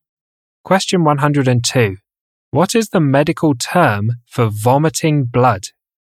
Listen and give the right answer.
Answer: Hematemesis.